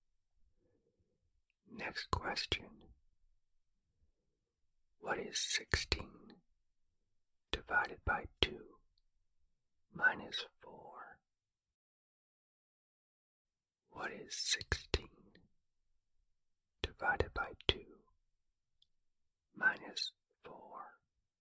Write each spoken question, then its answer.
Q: What is 16 divided by 2 minus 4?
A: The answer is 4.